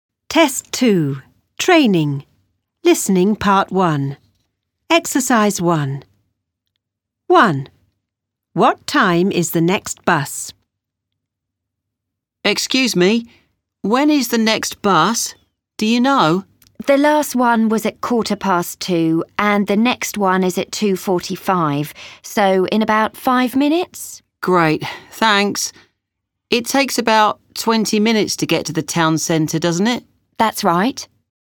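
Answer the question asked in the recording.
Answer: 2:45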